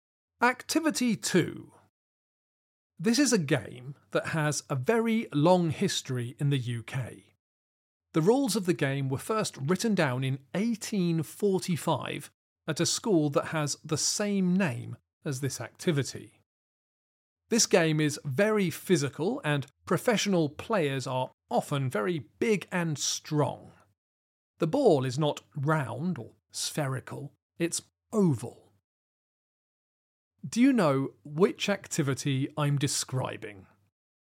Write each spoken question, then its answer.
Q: Do you know which activity I'm describing?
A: The answer is rugby.